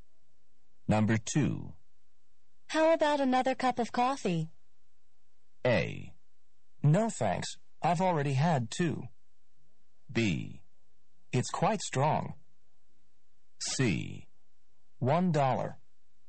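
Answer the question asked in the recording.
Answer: A: No thanks, I've already had two.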